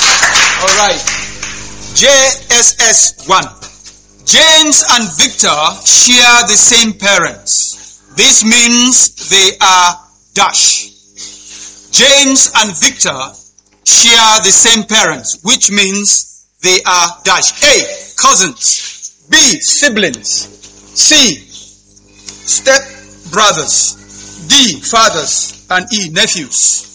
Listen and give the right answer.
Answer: Siblings. Round of applause.